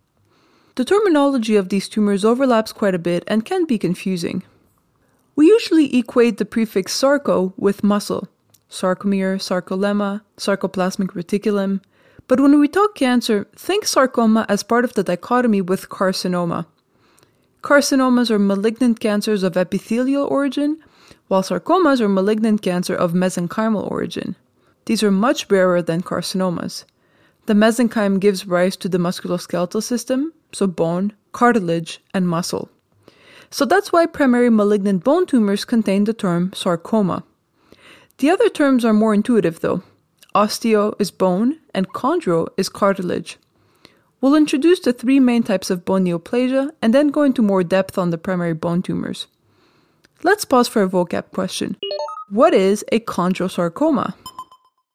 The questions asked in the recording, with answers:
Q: What is a chondrosarcoma?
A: A chondrosarcoma is a malignant tumor that originates from cartilage cells.